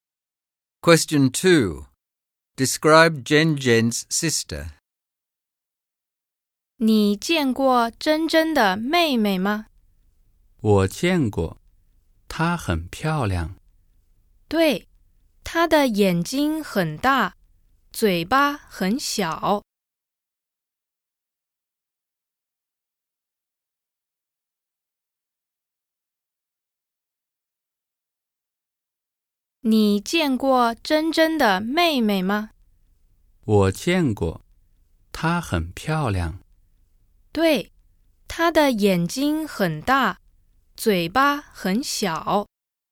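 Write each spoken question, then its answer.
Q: Describe Zhen Zhen's sister.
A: She is very pretty, with big eyes and a small mouth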